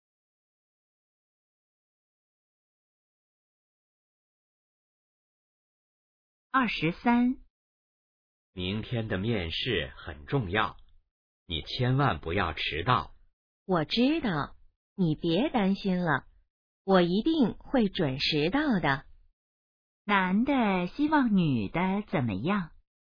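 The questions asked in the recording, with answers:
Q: 男的希望女的怎么样?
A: 面试别迟到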